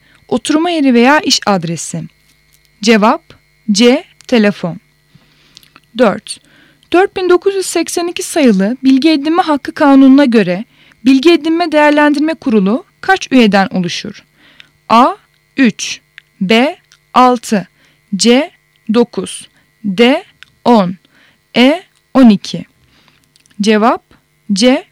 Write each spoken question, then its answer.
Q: 4982 sayılı Bilgi Edinme Hakkı Kanunu'na göre Bilgi Edinme Değerlendirme Kurulu kaç üyeden oluşur?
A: Cevap C. 9